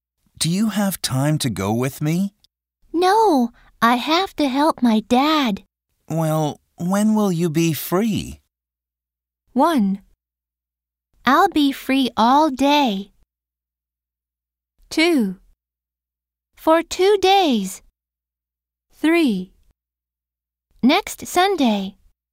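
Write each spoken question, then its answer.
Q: Well, when will you be free?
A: 3: Next Sunday.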